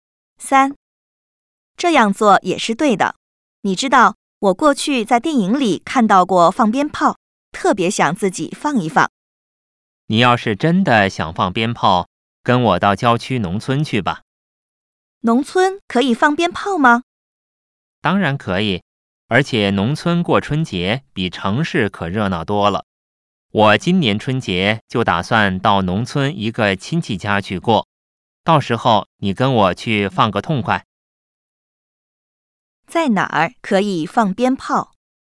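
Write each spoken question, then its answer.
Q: 在哪儿可以放鞭炮?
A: 郊区农村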